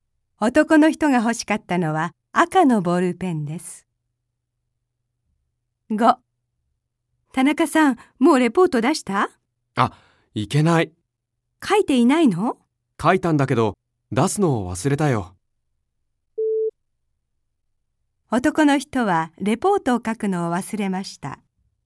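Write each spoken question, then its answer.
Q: 男の人はレポートを書くのを忘れました。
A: 正しくない(出すのを忘れた)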